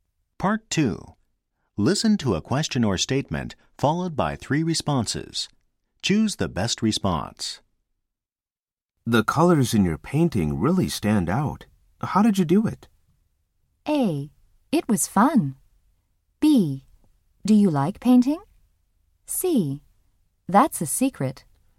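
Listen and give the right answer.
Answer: C: That's a secret.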